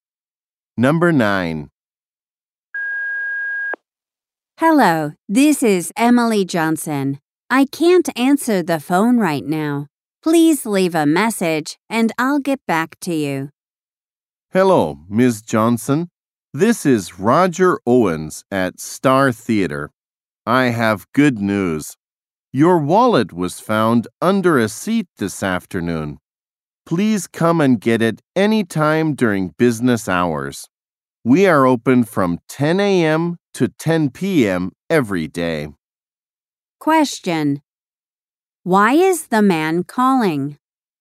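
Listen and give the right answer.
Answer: Her wallet was found at the theater.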